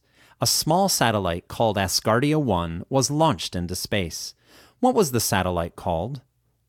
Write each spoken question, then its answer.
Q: What was the satellite called?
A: The satellite was called Asgardia 1.